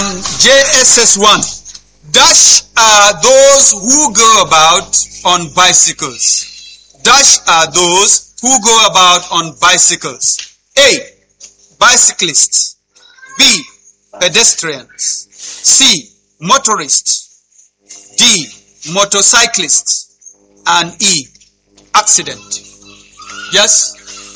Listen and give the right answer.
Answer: Bicyclists, which is A. Round of applause for them.